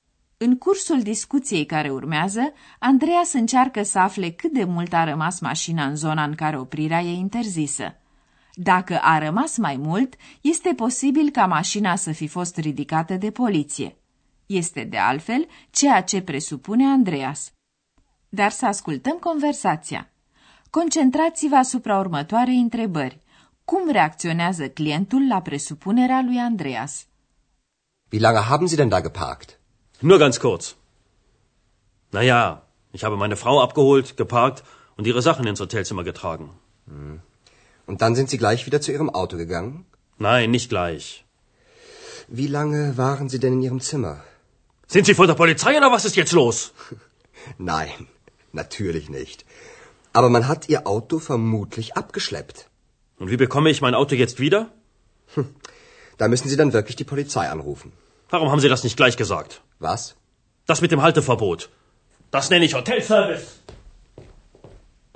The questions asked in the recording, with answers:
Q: Cum reacționează clientul la presupunerea lui Andreas?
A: Clientul își varsă pe Andreas năduful că i s-a ridicat mașina.